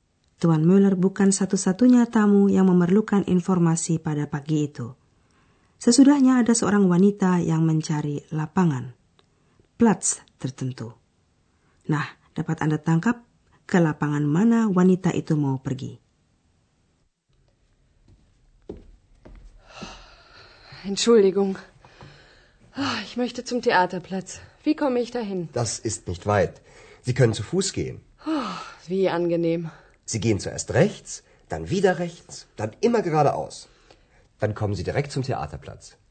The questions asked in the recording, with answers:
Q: Nah, dapat Anda tangkap ke lapangan mana wanita itu mau pergi.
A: Lapangan yang dimaksud wanita itu adalah lapangan teater.